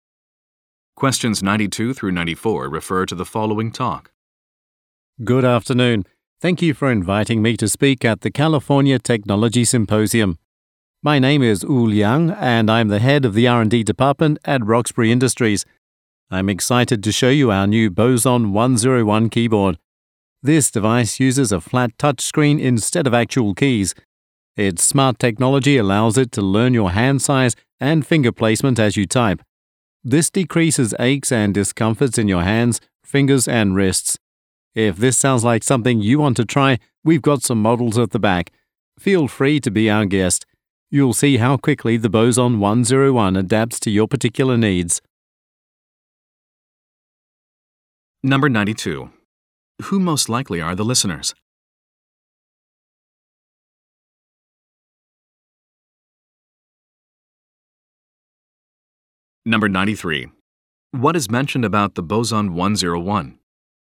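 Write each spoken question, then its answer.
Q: Who most likely are the listeners?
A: People attending a technology symposium

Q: What is mentioned about the Boson 101?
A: It adapts to the user's hand size and finger placement, reducing discomfort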